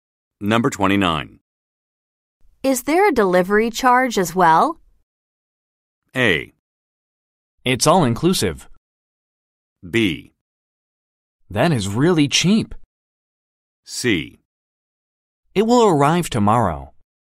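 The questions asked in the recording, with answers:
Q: Is there a delivery charge as well?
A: A: It's all inclusive.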